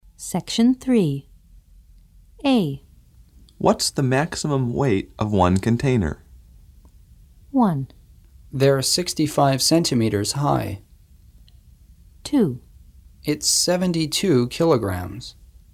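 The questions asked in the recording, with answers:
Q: What's the maximum weight of one container?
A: 2: It's 72 kilograms.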